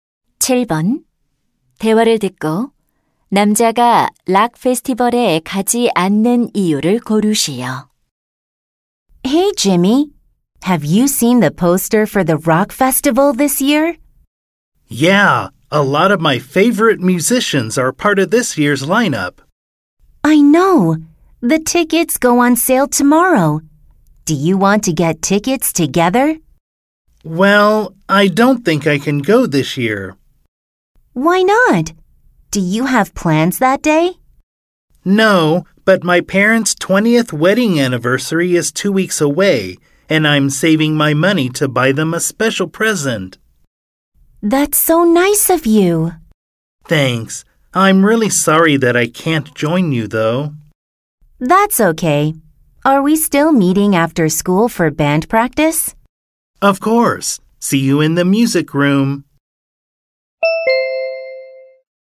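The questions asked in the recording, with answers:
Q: 대화를 듣고 남자가 락 페스티벌에 가지 않는 이유를 고르시오.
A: 부모님 결혼기념일 선물을 사기 위해 돈을 모으고 있어서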